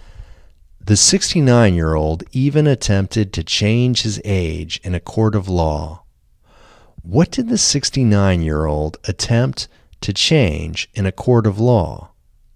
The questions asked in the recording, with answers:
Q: What did the 69-year-old attempt to change in a court of law?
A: The 69-year-old attempted to change his age in a court of law.